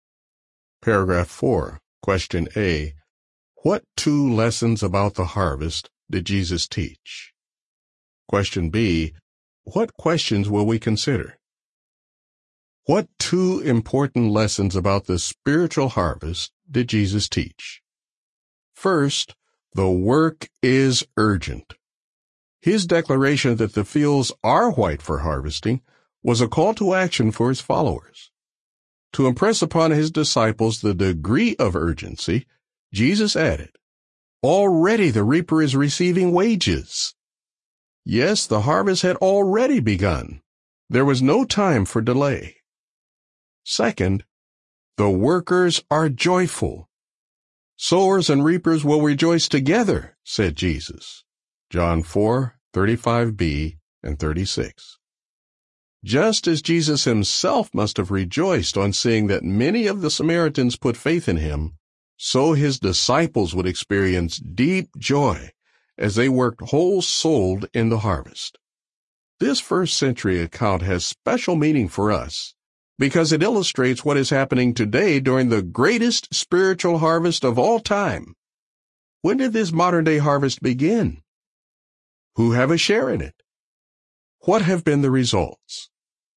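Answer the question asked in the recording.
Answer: The work is urgent, and the workers are joyful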